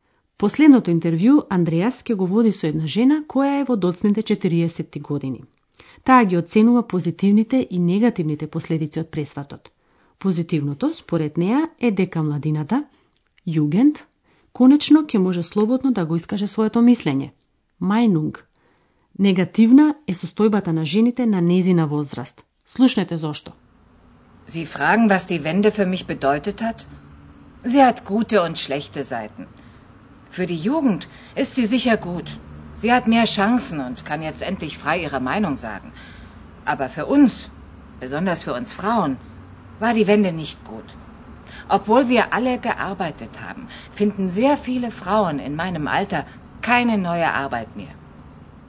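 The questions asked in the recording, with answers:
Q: Слушнете зошто.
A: Многу жени на нејзина возраст не можат да најдат нова работа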